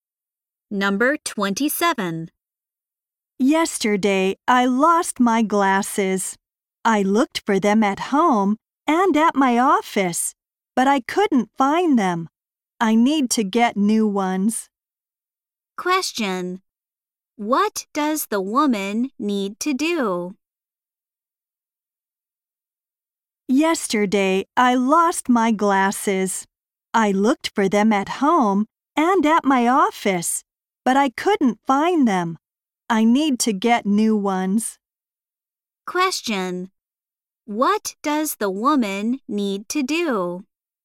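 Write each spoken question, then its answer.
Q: What does the woman need to do?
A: Get new glasses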